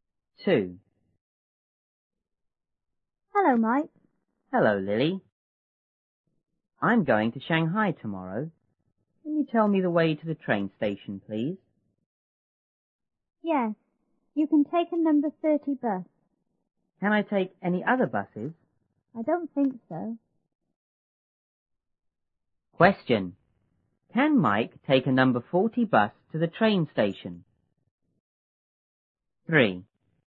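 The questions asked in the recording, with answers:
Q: Can Mike take a number 40 bus to the train station?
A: No, he can't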